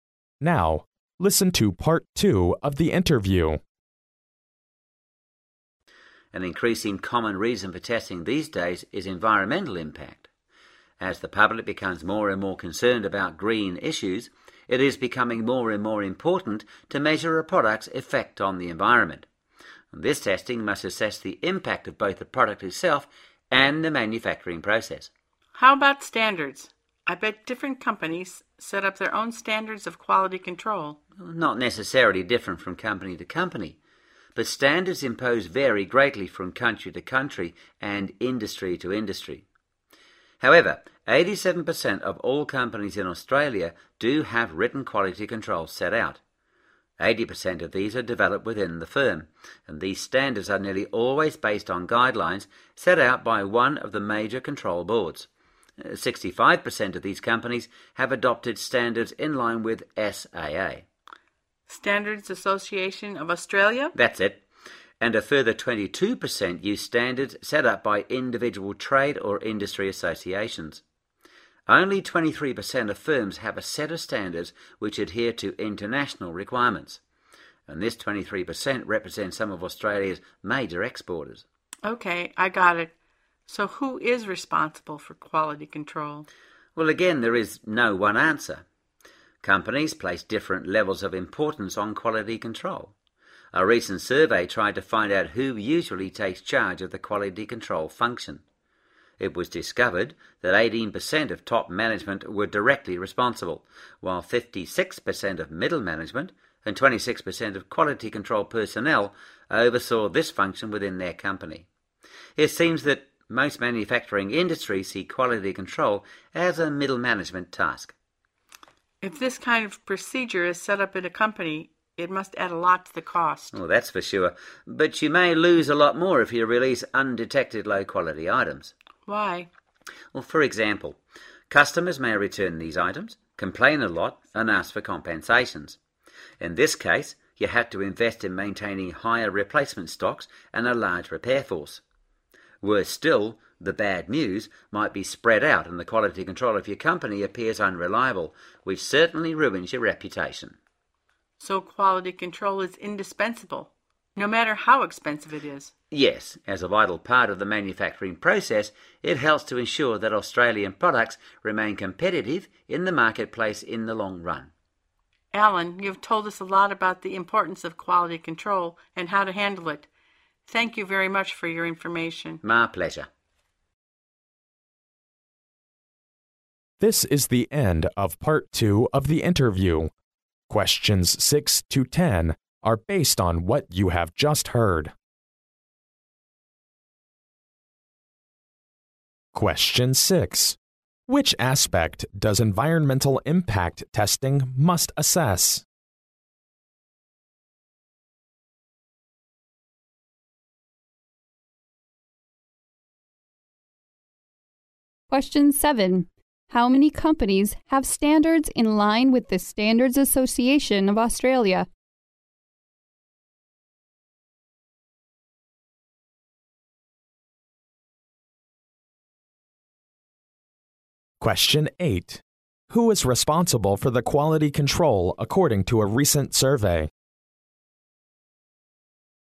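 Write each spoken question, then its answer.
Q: Which aspect does environmental impact testing must assess?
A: The impact of both the product itself and the manufacturing process

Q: How many companies have standards in line with the Standards Association of Australia?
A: 65%

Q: Who is responsible for the quality control according to a recent survey?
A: Mostly middle management (56%), with 18% top management and 26% quality control personnel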